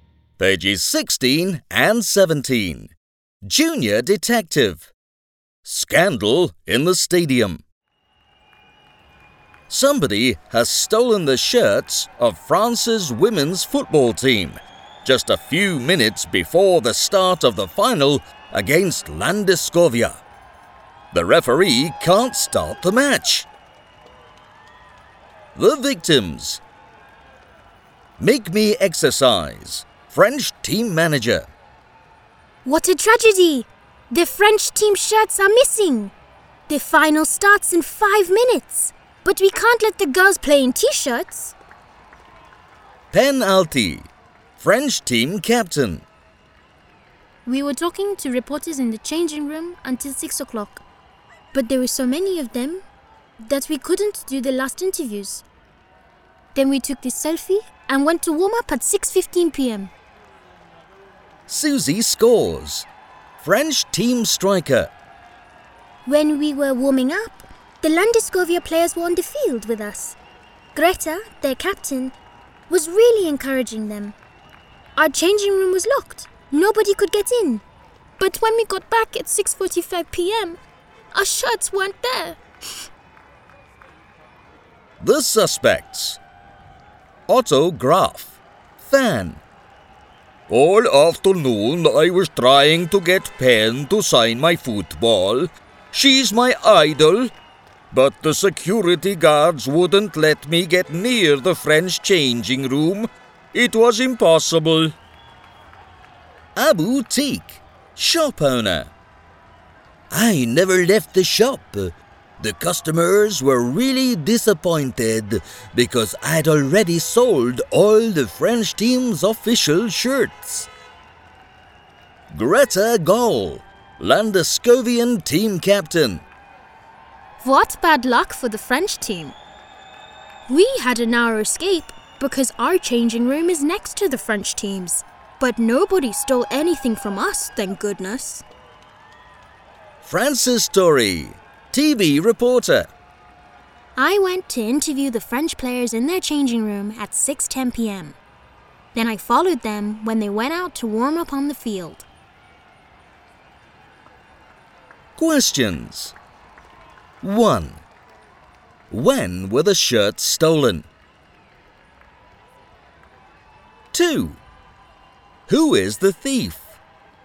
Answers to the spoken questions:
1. The robbery took place when the French team was warming up on the field between 6:15 p.m.
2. France's story is lying.